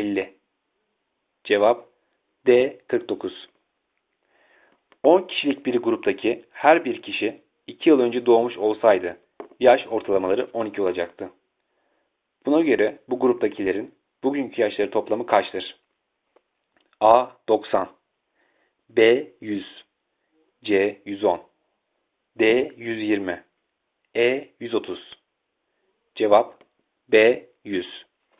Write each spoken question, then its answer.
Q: Buna göre bu gruptakilerin bugünkü yaşları toplamı kaçtır?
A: Cevap B 100.